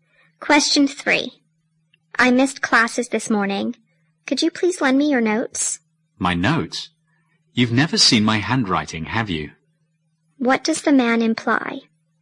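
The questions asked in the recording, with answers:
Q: What does the man imply?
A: His handwriting is hard to read, so his notes won't help.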